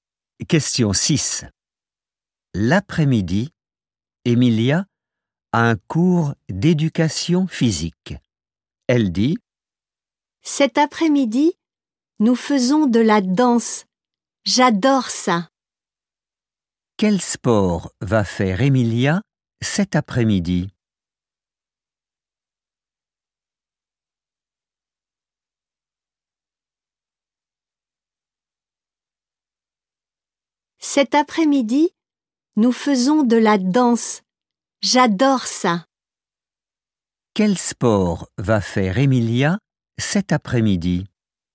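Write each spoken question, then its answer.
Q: Quel sport va faire Emilia cet après-midi ?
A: La danse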